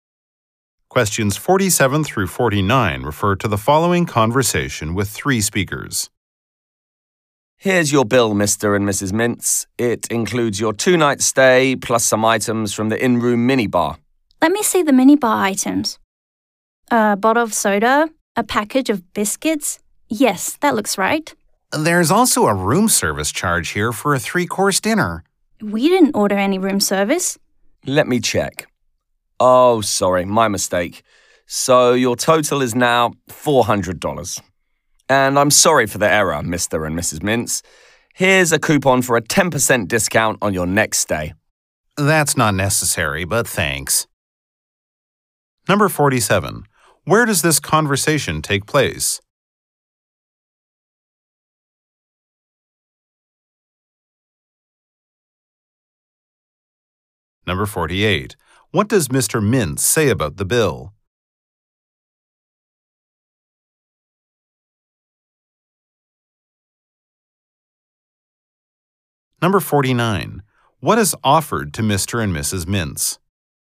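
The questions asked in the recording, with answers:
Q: Where does this conversation take place?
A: At a hotel

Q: What is offered to Mr.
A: A coupon for 10% off their next stay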